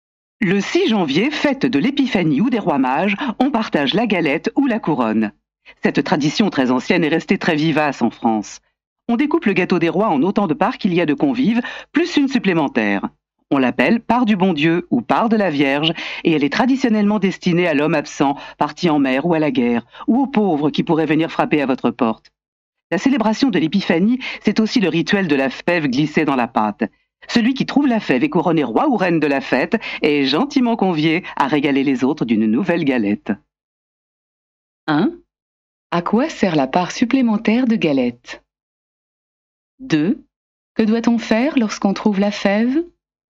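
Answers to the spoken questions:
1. Elle est destinée à l'homme absent (parti en mer ou à la guerre) ou aux pauvres qui pourraient frapper à la porte.
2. On est couronné roi ou reine et on doit offrir une nouvelle galette aux autres.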